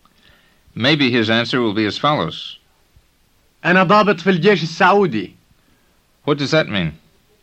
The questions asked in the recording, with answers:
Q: What does that mean?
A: It means I'm an officer in the Saudi army.